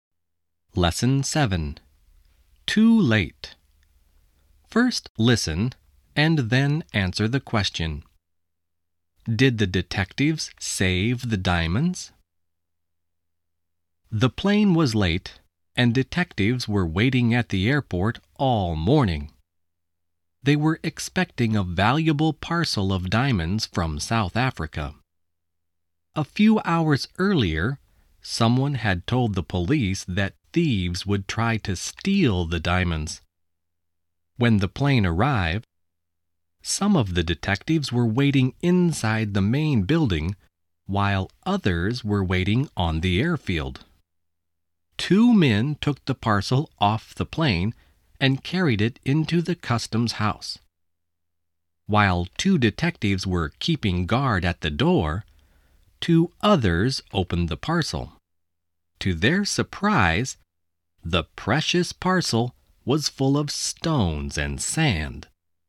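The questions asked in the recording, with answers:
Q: Did the detectives save the diamonds?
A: No, the parcel was full of stones and sand.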